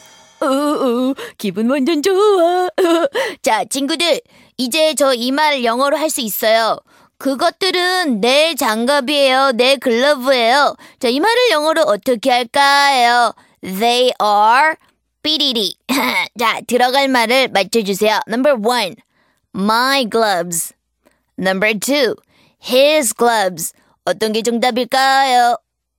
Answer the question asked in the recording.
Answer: 그래서 my gloves. 정답은 1번이 되겠네요.